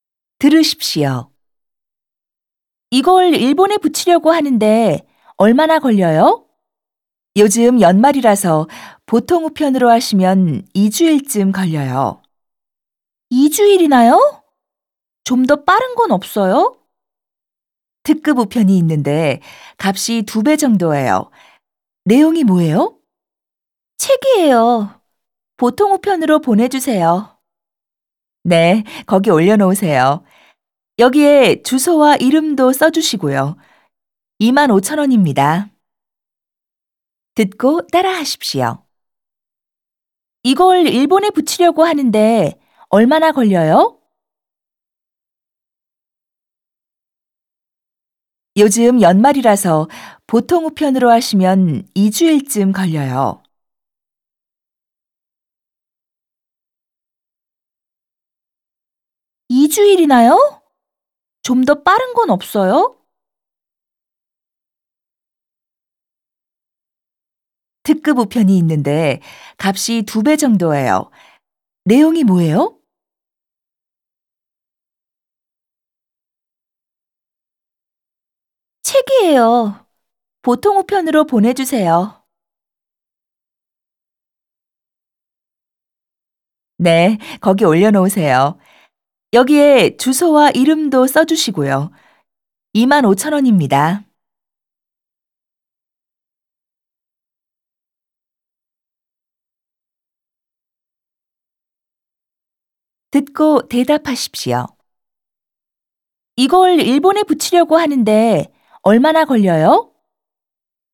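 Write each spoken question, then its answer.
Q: 이걸 일본에 붙이려고 하는데 얼마나 걸려요?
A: 보통 우편으로 2주일쯤 걸려요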